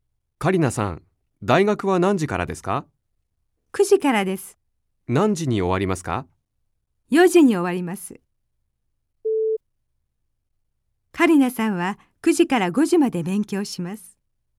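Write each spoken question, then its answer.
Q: カリナさんは9時から5時まで勉強します。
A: ×(4時に終わります)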